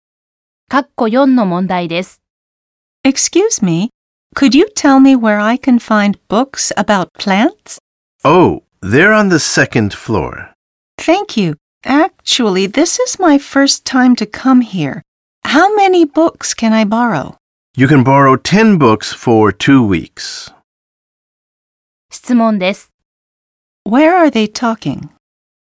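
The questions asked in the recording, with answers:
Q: Where are they talking?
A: At a library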